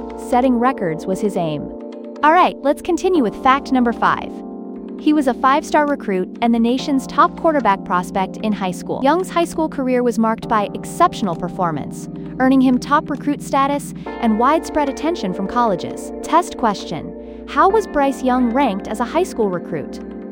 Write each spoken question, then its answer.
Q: how was Bryce Young ranked as a high school recruit?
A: 5-star recruit.